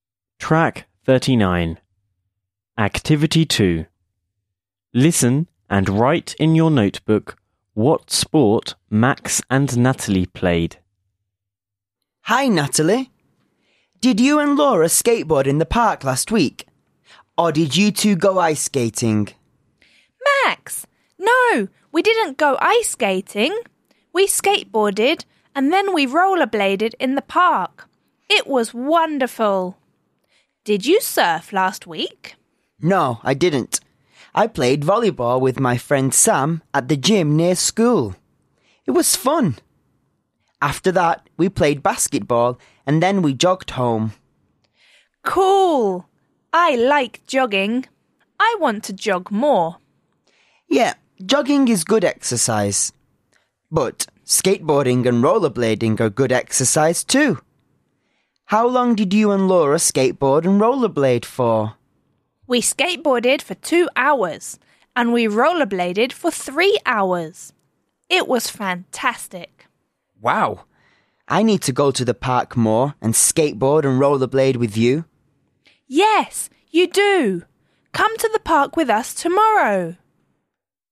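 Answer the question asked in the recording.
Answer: Natalie skateboarded and rollerbladed; Max played volleyball and basketball and jogged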